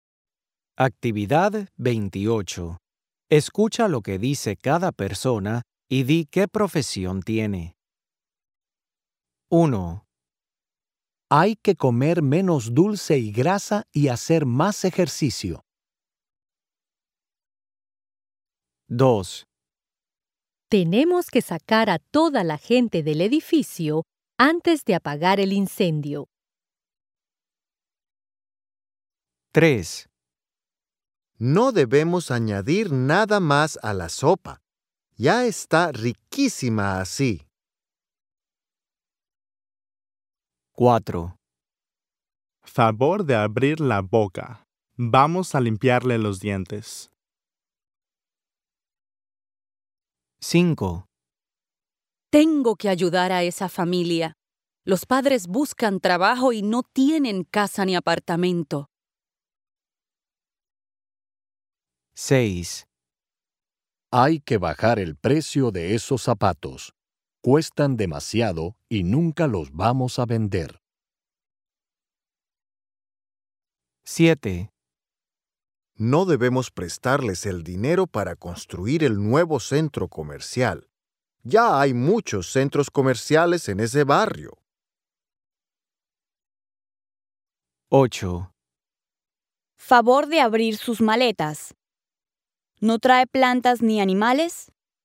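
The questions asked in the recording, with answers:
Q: Escucha lo que dice cada persona y di qué profesión tiene.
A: bombero

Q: Escucha lo que dice cada persona y di qué profesión tiene.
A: cocinero

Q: Escucha lo que dice cada persona y di qué profesión tiene.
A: dentista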